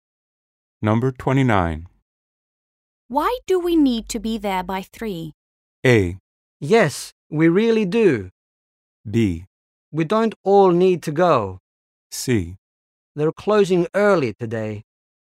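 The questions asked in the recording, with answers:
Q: Why do we need to be there by 3?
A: C: They're closing early today.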